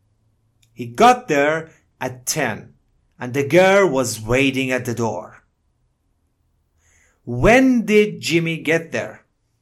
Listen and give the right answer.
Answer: At 10 o'clock. He got there at 10 o'clock.